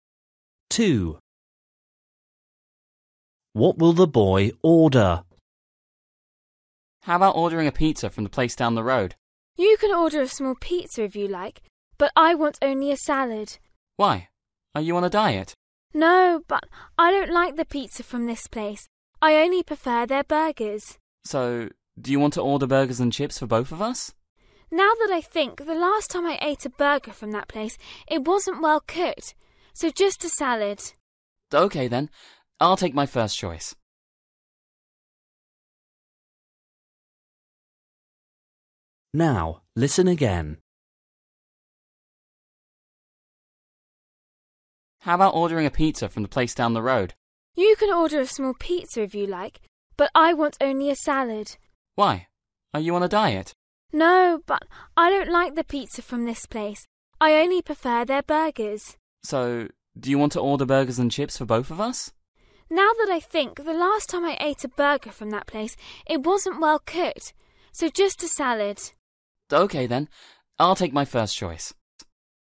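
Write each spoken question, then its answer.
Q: What will the boy order?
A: a salad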